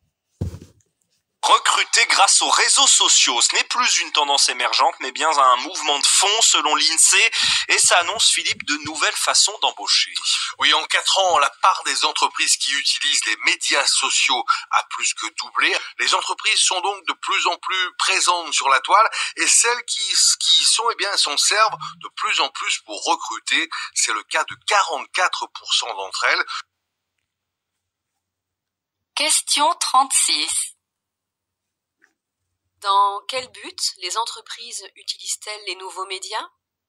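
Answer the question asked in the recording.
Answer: Pour recruter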